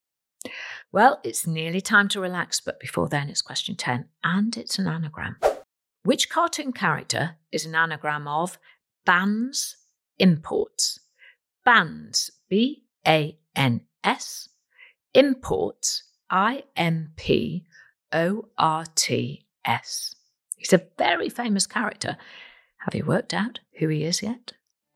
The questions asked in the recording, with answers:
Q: Which cartoon character is an anagram of bans imports?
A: It's everybody's favourite animated 10 year old, Bart Simpson.